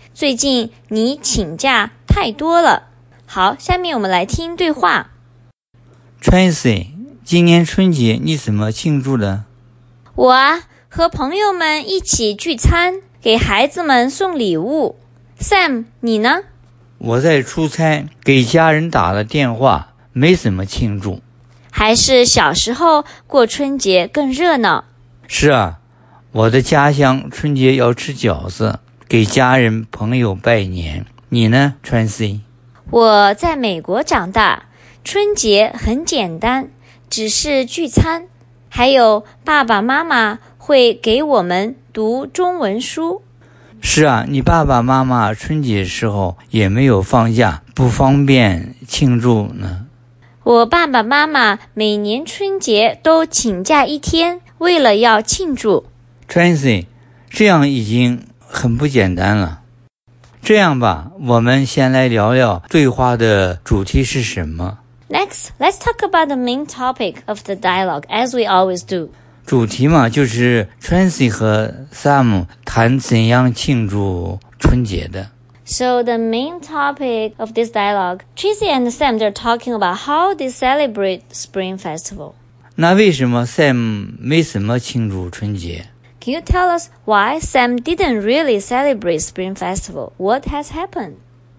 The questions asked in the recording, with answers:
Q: 那为什么 Sam 没什么庆祝春节?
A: 在出差,给家人打了电话,没什么庆祝。